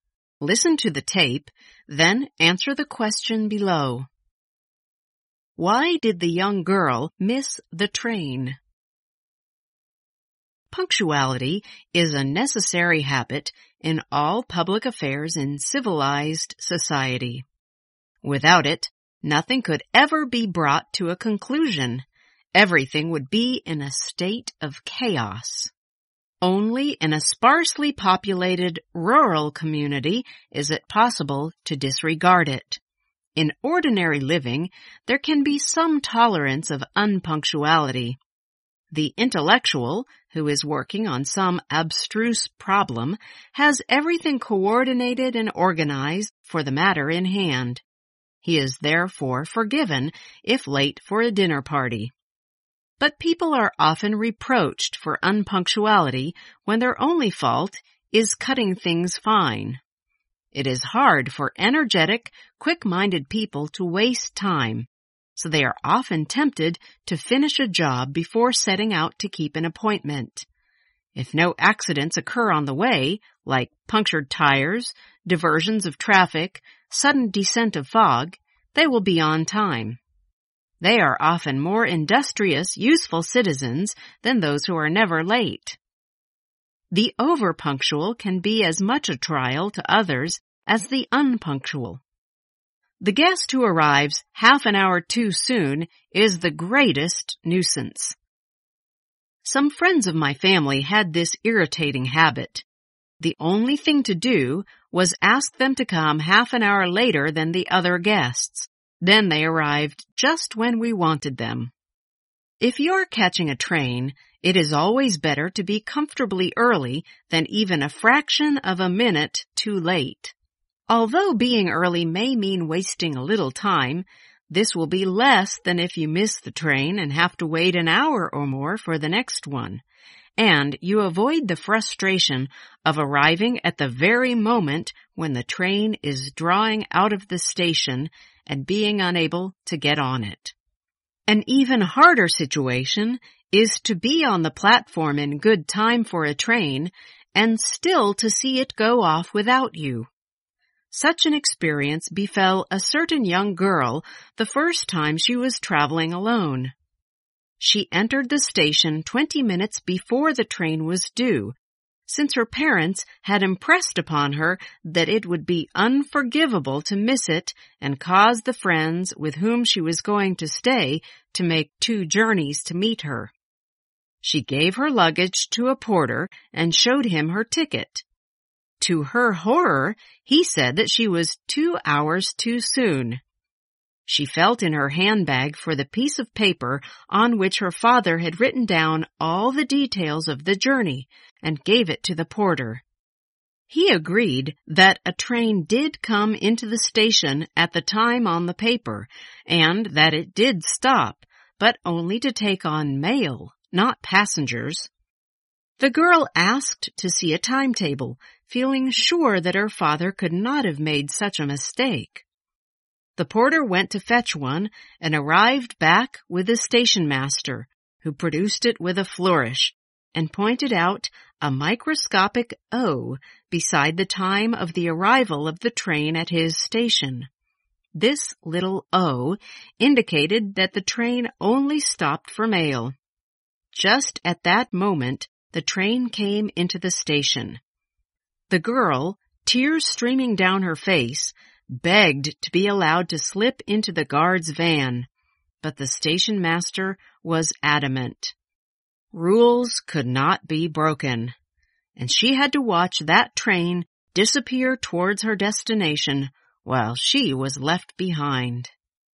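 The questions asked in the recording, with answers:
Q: Why did the young girl miss the train?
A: The train only stopped there for mail, not passengers, so she wasn't allowed to board it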